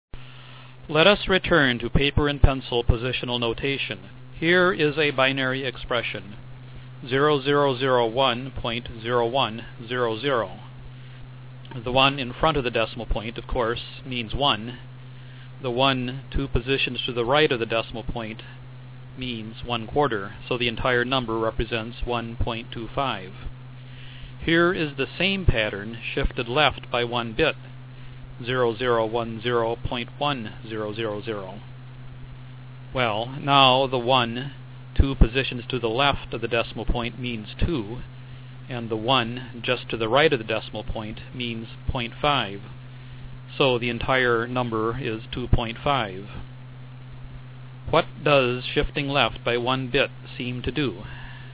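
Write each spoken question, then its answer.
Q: What does shifting left by 1 bit seem to do?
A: It doubles the number (multiplies it by 2)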